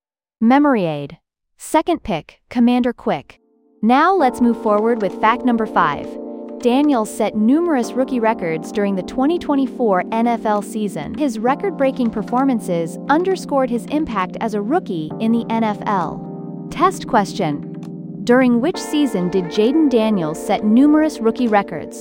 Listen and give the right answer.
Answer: 2024 NFL season.